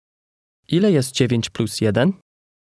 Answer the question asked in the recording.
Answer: 10.